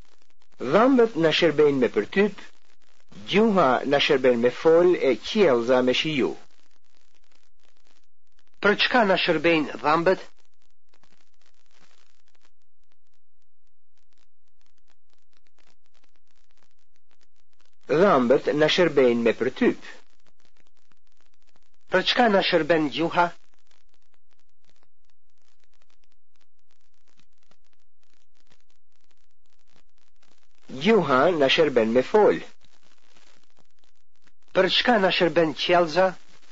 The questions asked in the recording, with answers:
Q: Për çka na shërbejnë dhëmbët?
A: Dhëmbët na shërbejnë me përtyp.

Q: Për çka na shërben qjellza?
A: Qjellza na shërben me shiju.